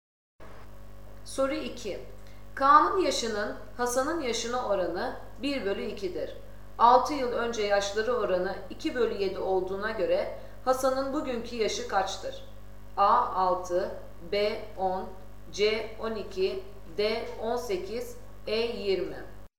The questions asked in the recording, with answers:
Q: 6 yıl önce yaşları oranı 2 bölü 7 olduğuna göre Hasan'ın bugünkü yaşı kaçtır?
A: Doğru cevap E 20.